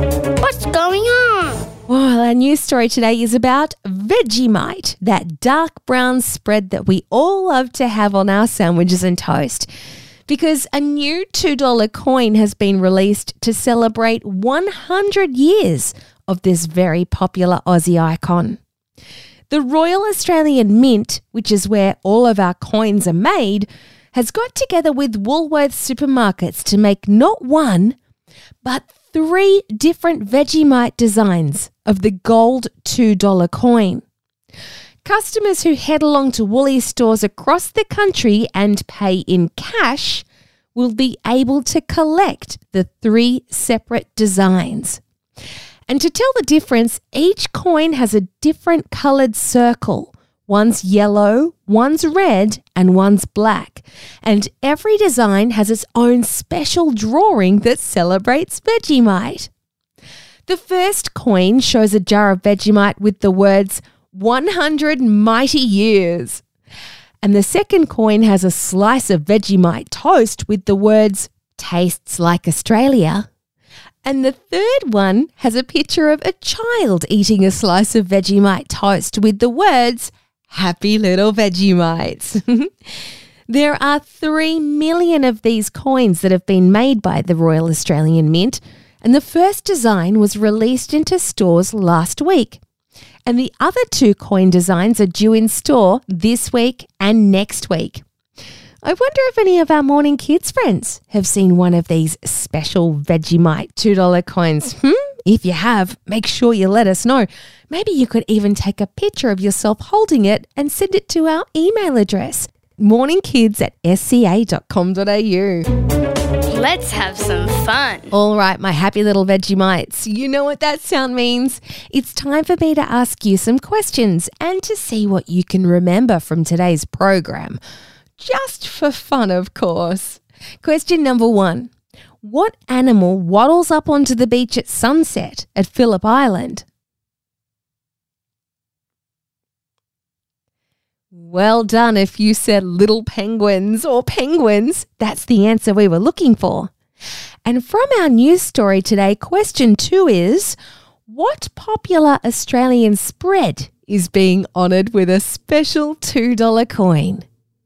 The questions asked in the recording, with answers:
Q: What popular Australian spread is being honoured with a special $2 coin?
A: It's Vegemite.